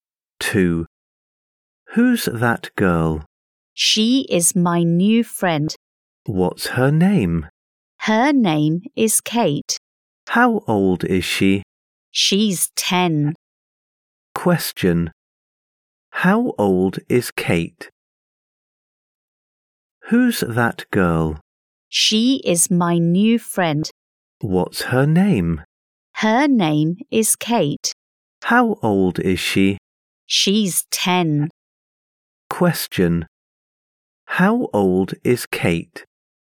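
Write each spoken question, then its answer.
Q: How old is Kate?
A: She's 10.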